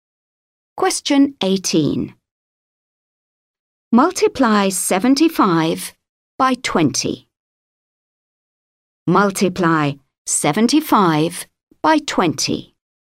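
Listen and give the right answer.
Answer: 1500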